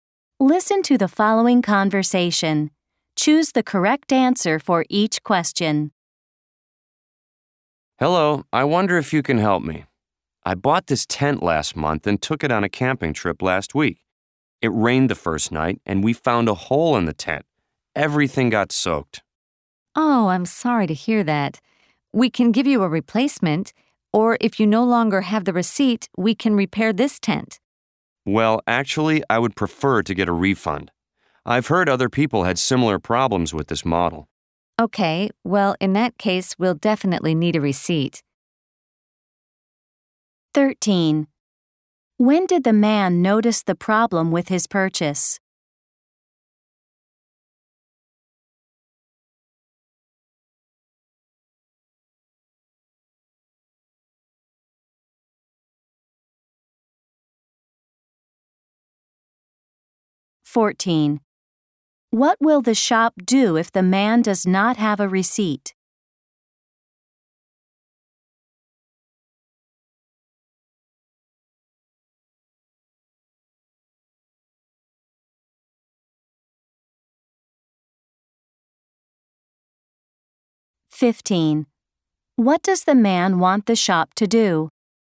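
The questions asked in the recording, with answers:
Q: When did the man notice the problem with his purchase?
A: On the first night of his camping trip last week, when it rained

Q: What will the shop do if the man does not have a receipt?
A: Repair the tent

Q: What does the man want the shop to do?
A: Give him a refund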